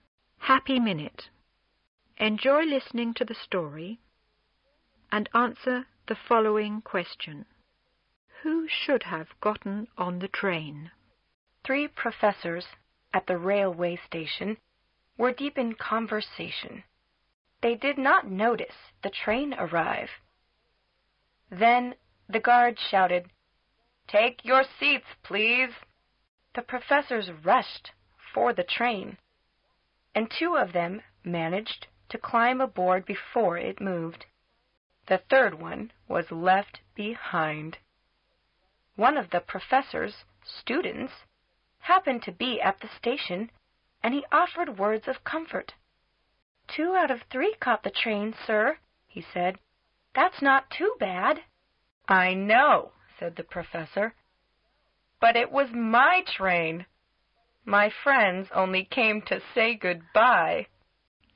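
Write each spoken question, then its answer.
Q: Who should have gotten on the train?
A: The third professor, the one left behind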